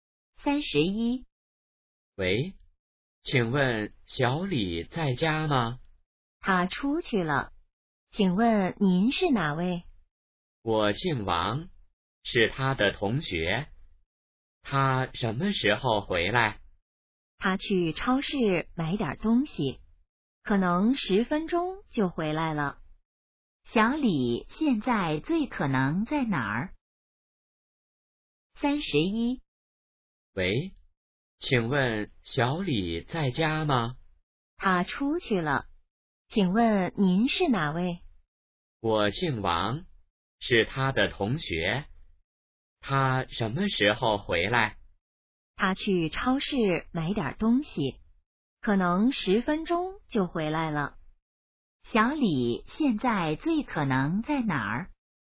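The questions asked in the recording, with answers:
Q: 小李现在最可能在哪儿?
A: 超市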